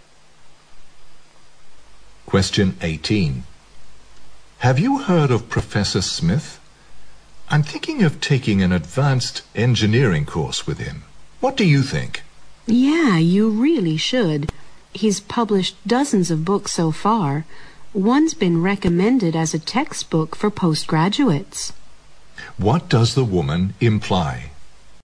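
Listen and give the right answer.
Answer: Professor Smith is a very accomplished scholar, so the man should take his course.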